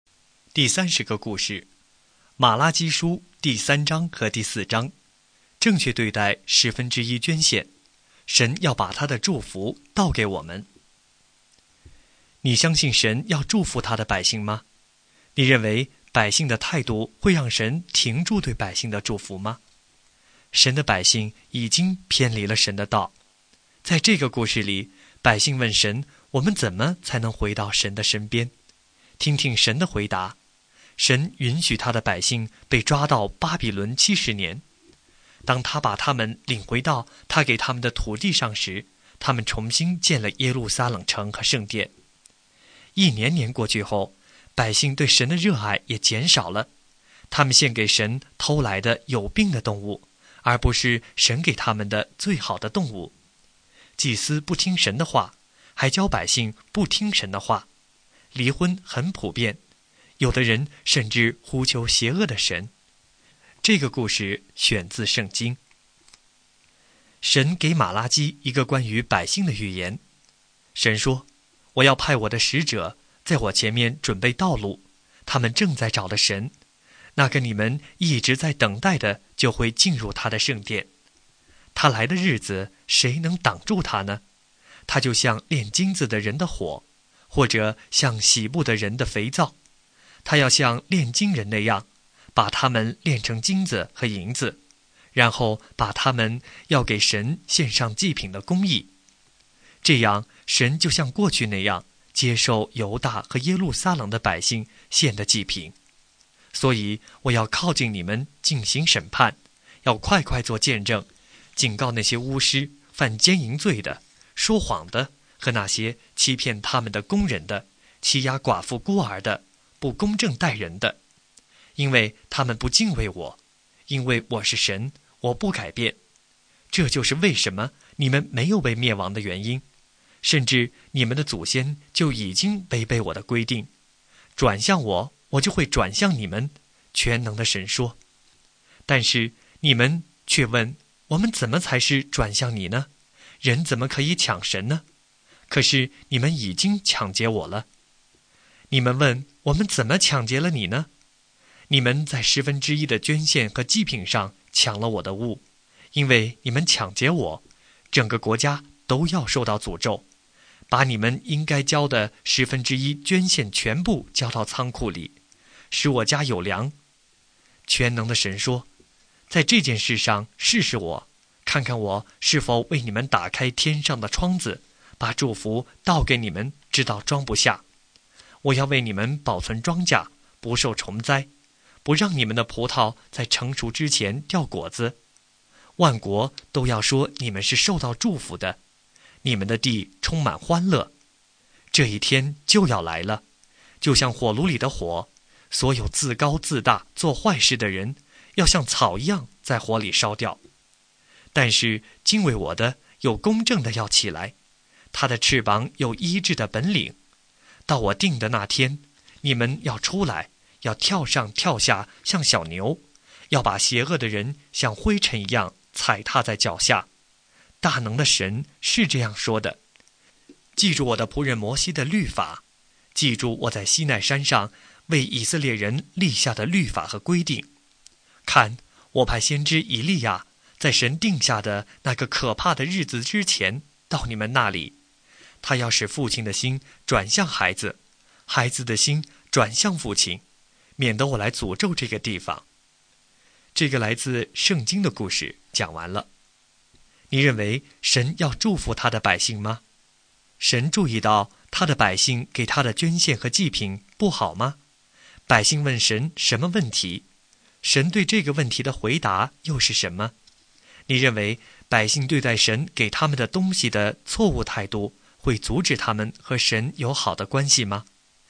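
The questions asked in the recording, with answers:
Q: 神注意到他的百姓给他的捐献和祭品不好吗?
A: 注意到了,他们献上偷来的有病的动物,并在十分之一的捐献和祭品上抢劫了神

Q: 百姓问神什么问题?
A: 我们怎么才是转向你呢?(我们怎么才能回到神的身边?)

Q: 神对这个问题的回答又是什么?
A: 他们在十分之一的捐献和祭品上抢劫了神;要把应该交的十分之一捐献全部交到仓库里,神就会把祝福倒给他们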